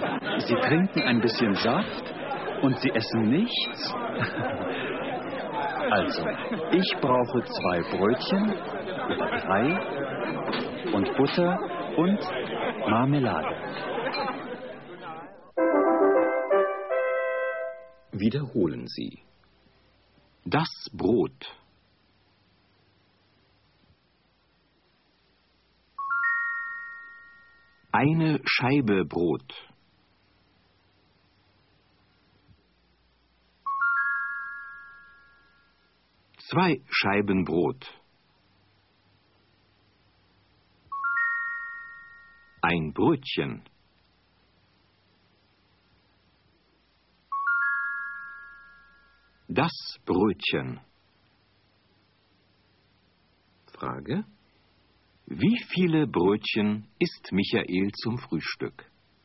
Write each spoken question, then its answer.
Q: Wie viele Brötchen isst Michael zum Frühstück?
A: Er isst 2 Brötchen zum Frühstück.